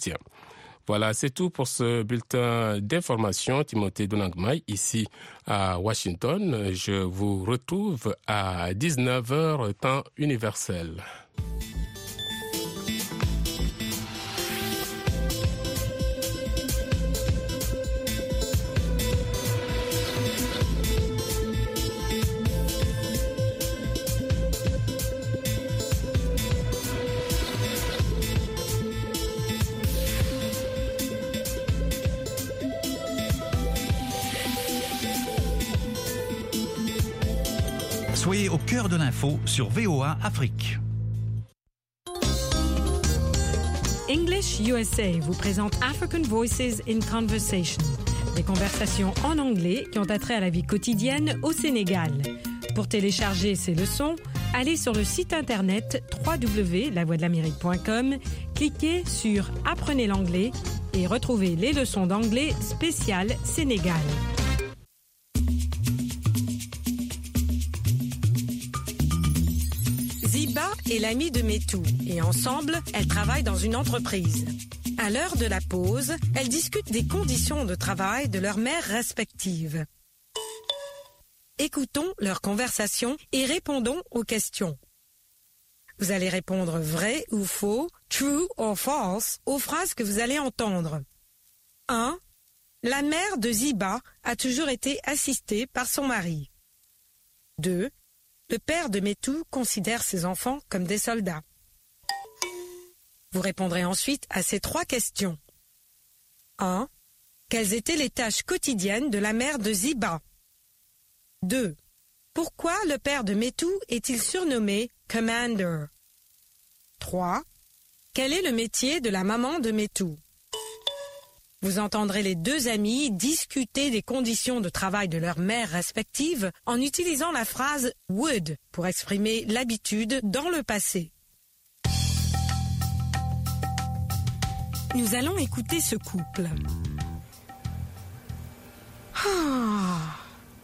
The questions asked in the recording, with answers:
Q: Pourquoi le père de Métou est-il surnommé « Commander »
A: Parce qu'il ne faisait que donner des ordres.

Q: Quel est le métier de la maman de Métou?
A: Elle est femme au foyer.